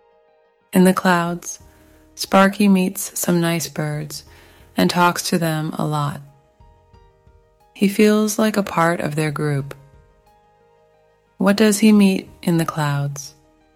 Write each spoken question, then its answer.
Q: What does he meet in the clouds?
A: Some nice birds. He meets some nice birds in the clouds.